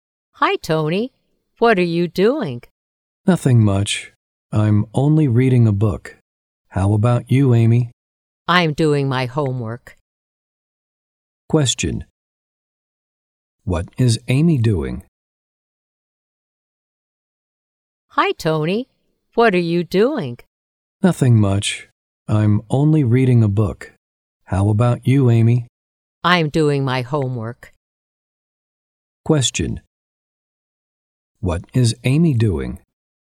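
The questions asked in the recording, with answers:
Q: What is Amy doing?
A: She is doing her homework.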